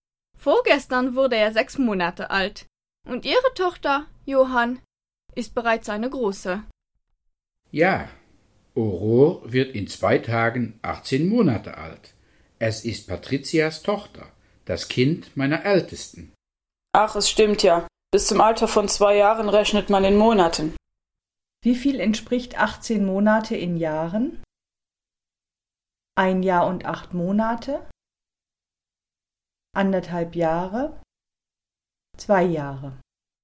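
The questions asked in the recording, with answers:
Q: Wie viel entspricht 18 Monate in Jahren?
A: 1,5 Jahre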